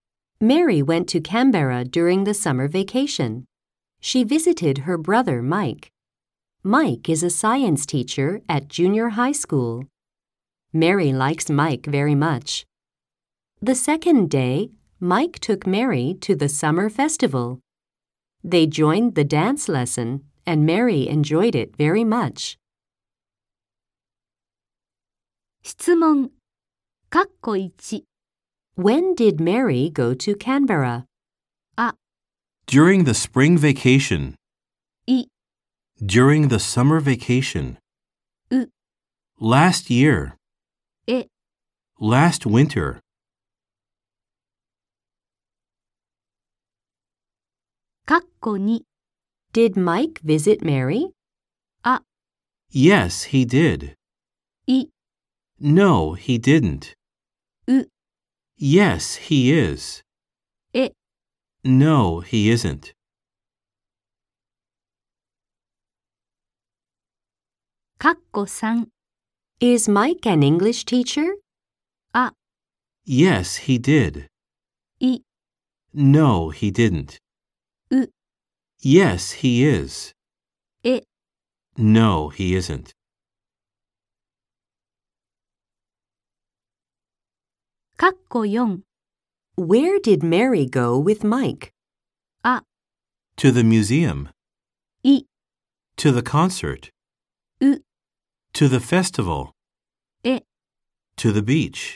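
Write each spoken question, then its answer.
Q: When did Mary go to Canberra?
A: い: During the summer vacation.

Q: Did Mike visit Mary?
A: い: No, he didn't.

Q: Is Mike an English teacher?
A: え: No, he isn't.

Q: Where did Mary go with Mike?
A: う: To the festival.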